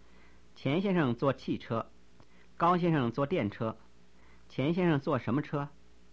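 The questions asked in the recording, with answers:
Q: 钱先生坐什么车?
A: 汽车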